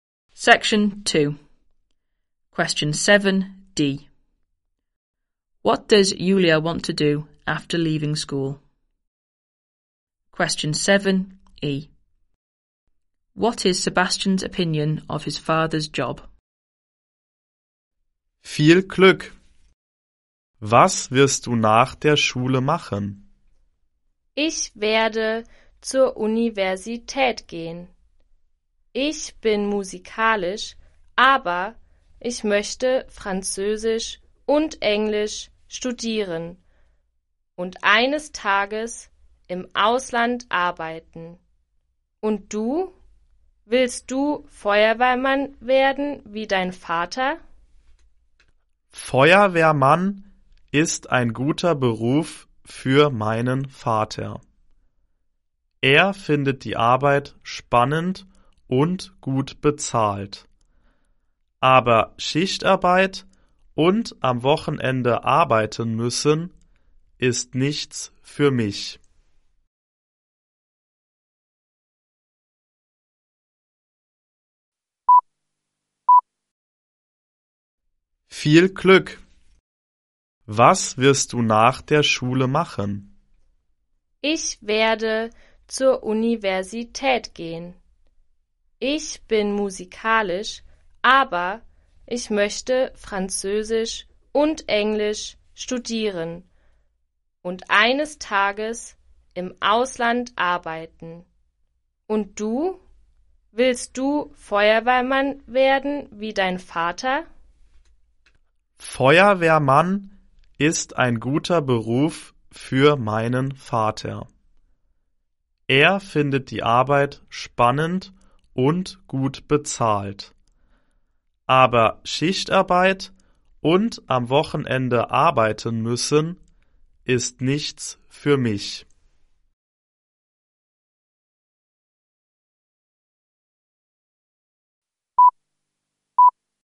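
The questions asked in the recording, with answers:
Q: What does Julia want to do after leaving school?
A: Go to university to study French and English and work abroad

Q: What is Sebastian's opinion of his father's job?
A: A good job for his father, but shift and weekend work is not for him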